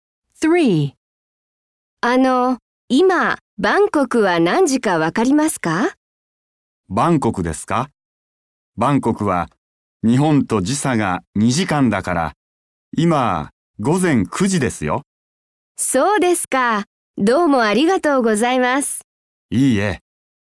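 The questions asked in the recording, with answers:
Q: 今、バンコクは何時かわかりますか?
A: 午前9時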